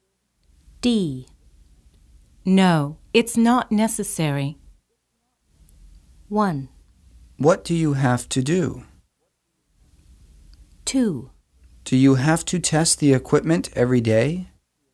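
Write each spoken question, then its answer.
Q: No, it's not necessary.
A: 2: Do you have to test the equipment every day?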